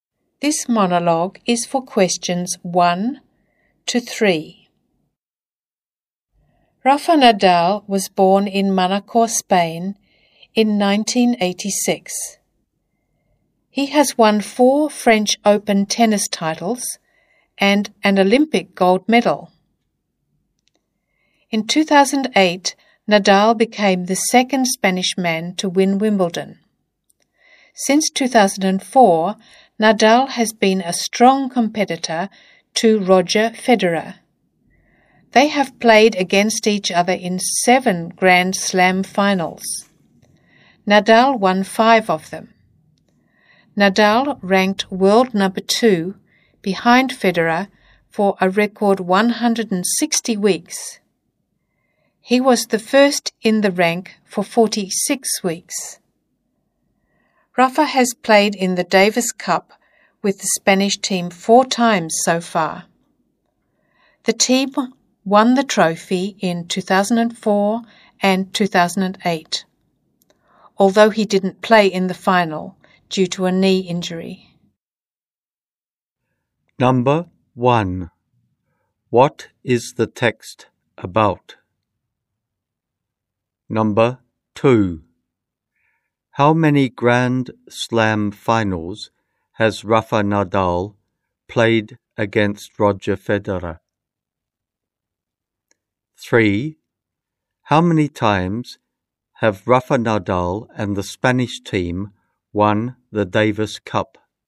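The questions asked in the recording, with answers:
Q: What is the text about?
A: Rafa Nadal

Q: How many times have Rafa Nadal and the Spanish team won the Davis Cup?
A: Twice (2004 and 2008)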